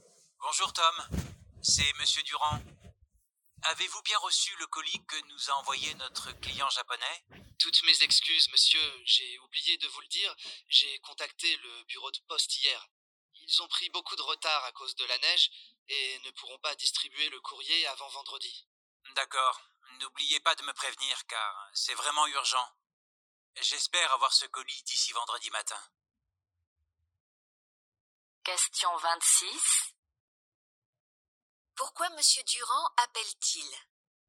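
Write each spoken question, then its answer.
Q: Pourquoi Monsieur Durand appelle-t-il ?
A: Pour savoir si Tom a bien reçu le colis envoyé par le client japonais.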